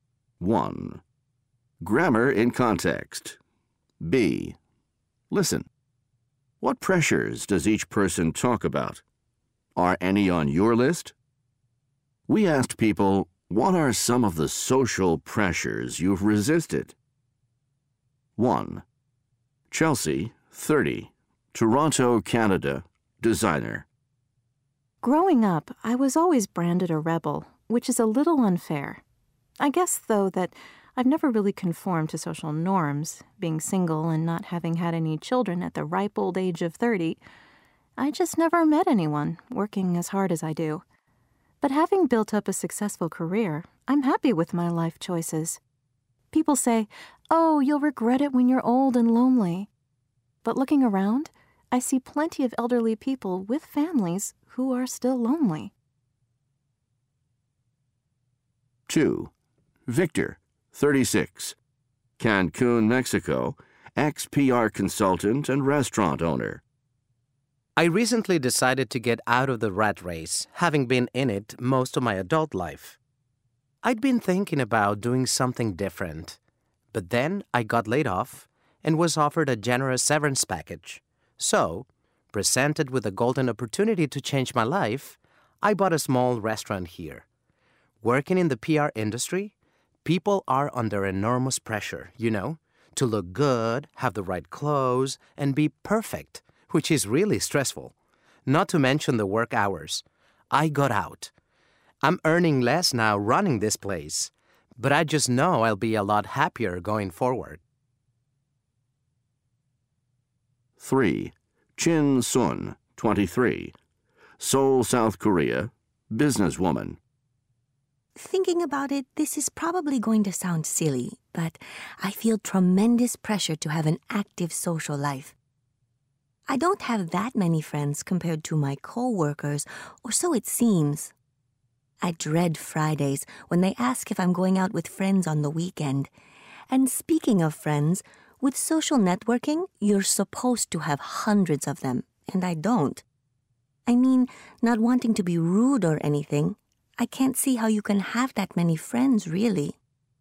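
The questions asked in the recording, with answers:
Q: What pressures does each person talk about?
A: Chelsea: pressure to conform, get married and have children; Victor: pressure in PR to look good, wear the right clothes, be perfect, and work long hours; Chin Sun: pressure to have an active social life and many friends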